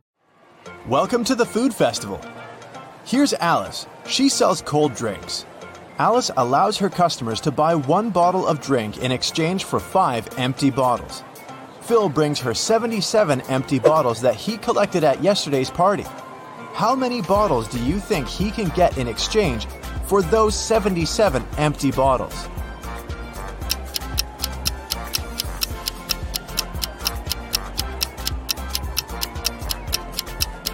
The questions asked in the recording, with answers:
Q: How many bottles do you think he can get in exchange for those 77 empty bottles?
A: Phil can get a total of 19 new bottles.